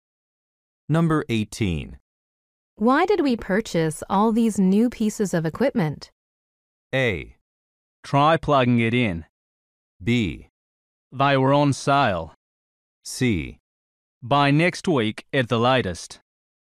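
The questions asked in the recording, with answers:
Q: Why did we purchase all these new pieces of equipment?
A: B: They were on sale.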